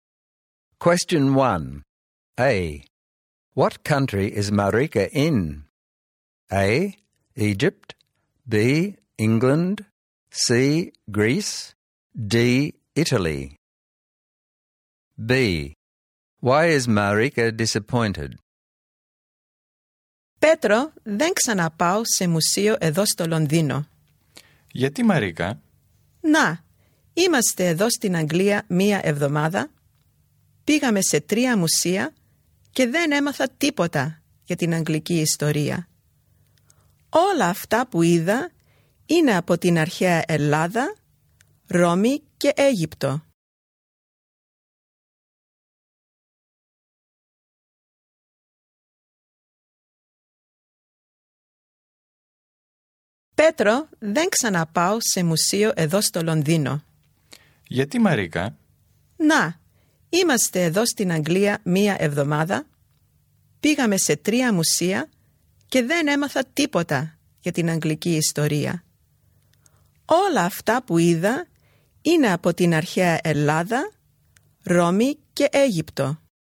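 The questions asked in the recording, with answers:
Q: What country is Marika in?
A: B: England

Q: Why is Marika disappointed?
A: The three museums she visited showed only ancient Greece, Rome and Egypt; she learned nothing about English history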